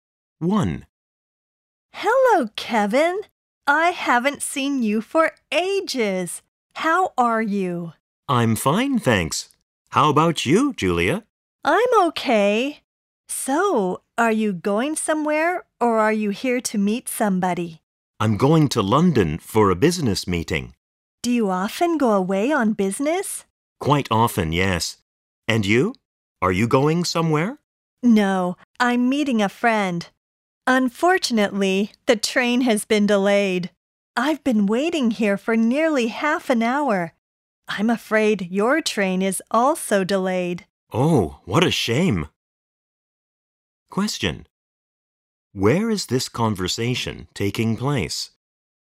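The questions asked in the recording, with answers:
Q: Where is this conversation taking place?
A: At a train station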